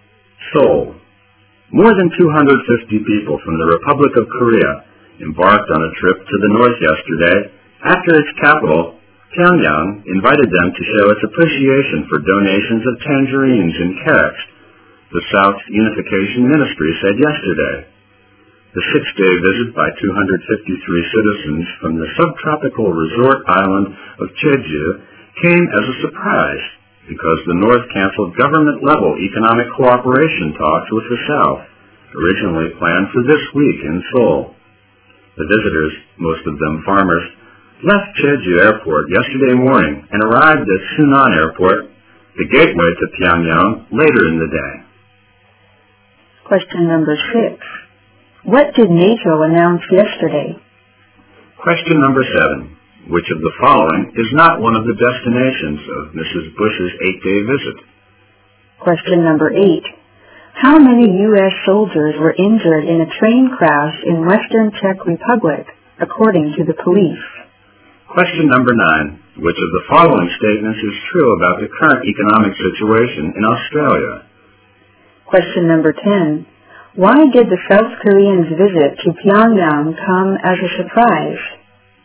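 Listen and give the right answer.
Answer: Because the North had canceled government-level economic cooperation talks with the South planned for that week in Seoul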